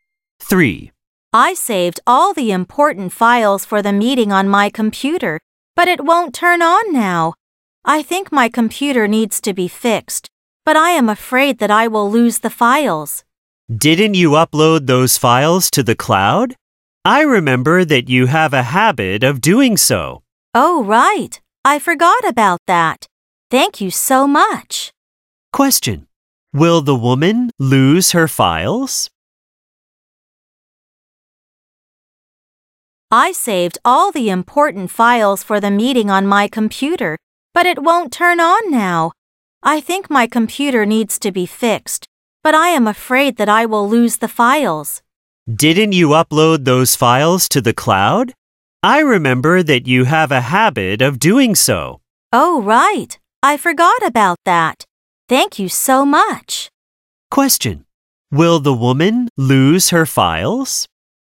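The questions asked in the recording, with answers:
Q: Will the woman lose her files?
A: No, she uploaded them to the cloud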